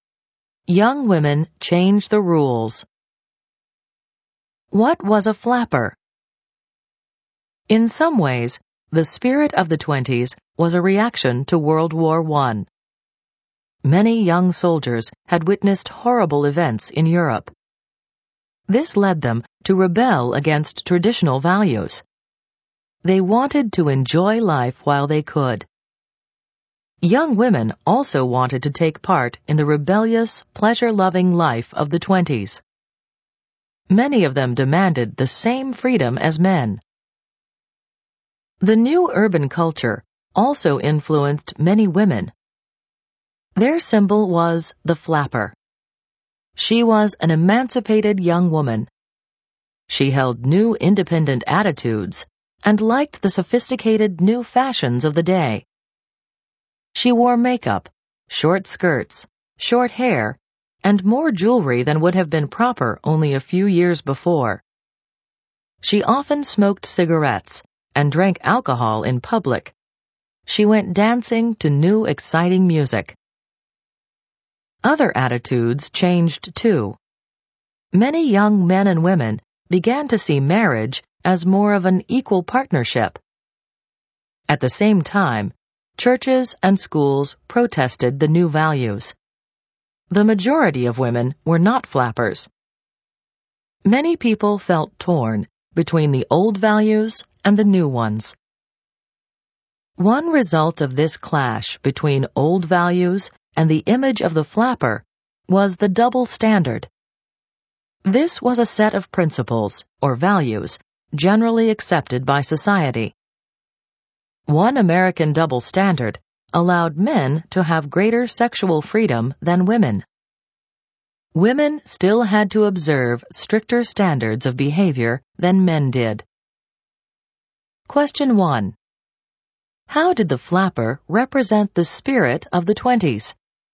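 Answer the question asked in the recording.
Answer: She was an emancipated young woman who rebelled against traditional values, with independent attitudes, new fashions, and a pleasure-loving life.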